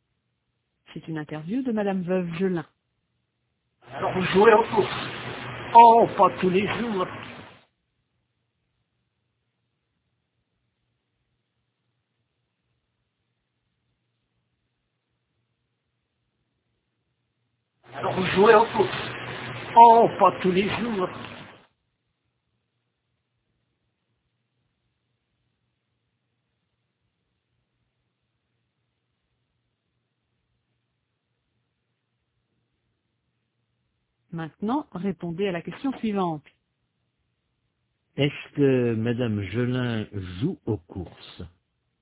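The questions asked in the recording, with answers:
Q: Est-ce que Madame Gelin joue aux courses ?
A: Oui, mais pas tous les jours.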